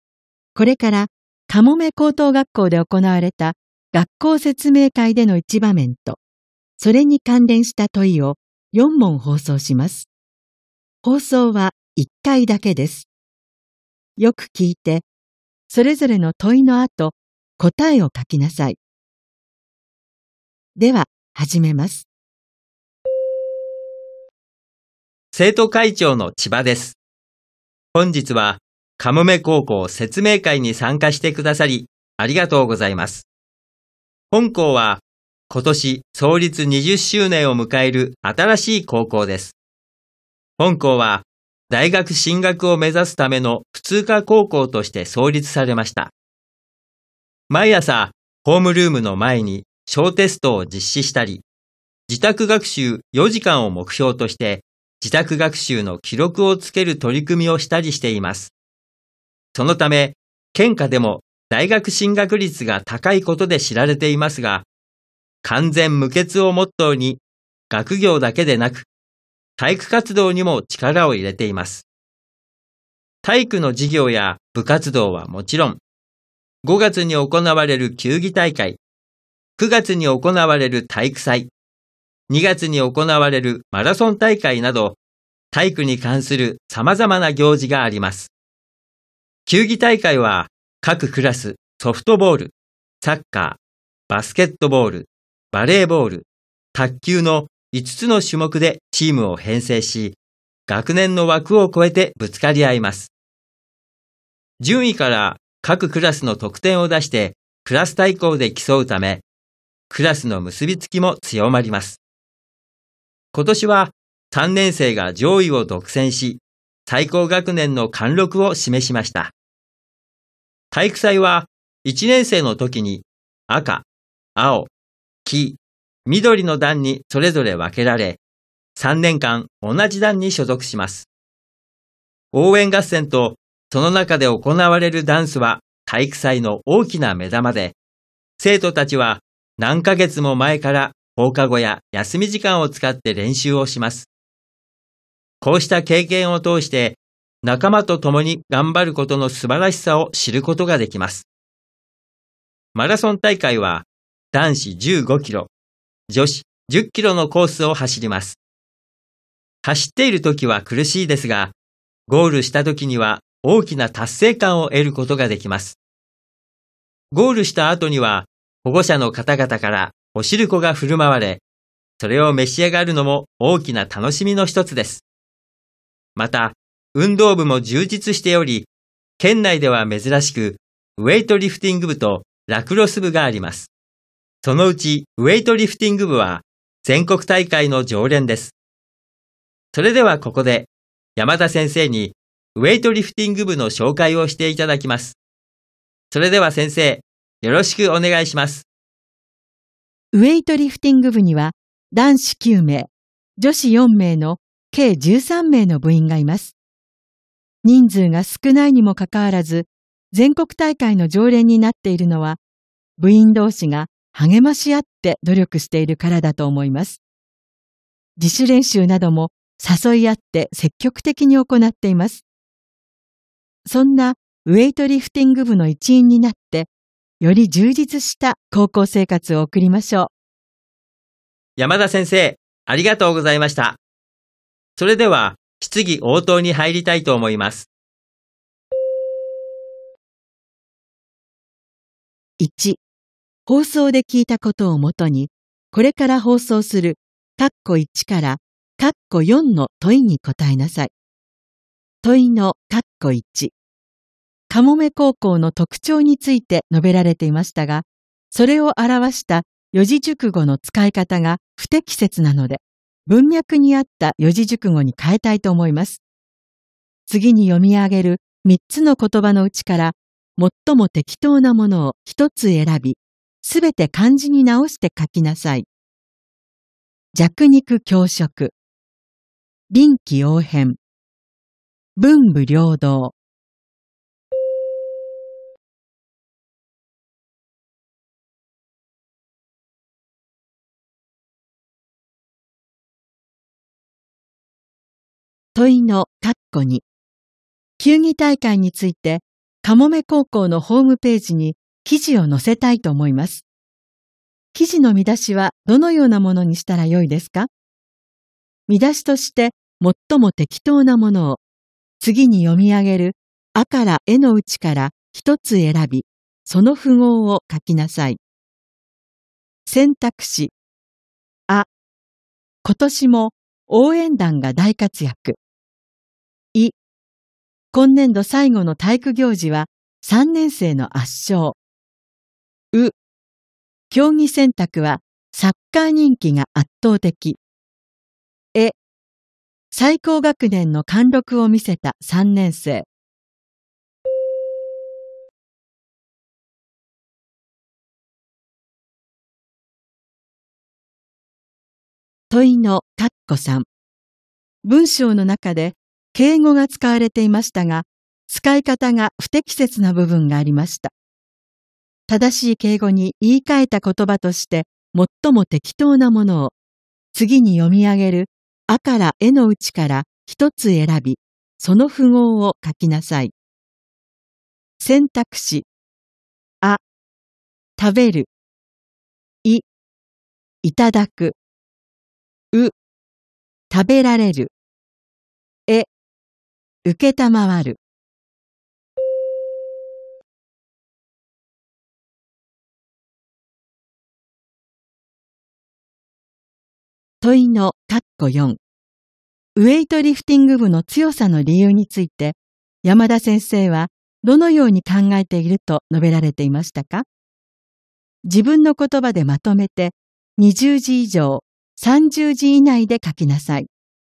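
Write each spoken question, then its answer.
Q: 問いのカッコ1。かもめ高校の特徴について述べられていましたが、それを表した四字熟語の使い方が不適切なので、文脈に合った四字熟語に変えたいと思います。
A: 文武両道

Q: 記事の見出しはどのようなものにしたらよいですか?見出しとして最も適当なものを、次に読み上げるあからえのうちから一つ選び、その符号を書きなさい。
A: え: 最高学年の貫禄を見せた3年生

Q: 正しい敬語に言い換えた言葉として最も適当なものを、次に読み上げるあからえのうちから一つ選び、その符号を書きなさい。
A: い: いただく

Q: 問いの括弧4。ウェイトリフティング部の強さの理由について、山田先生はどのように考えていると述べられていましたか?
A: 部員同士が励まし合って努力しているから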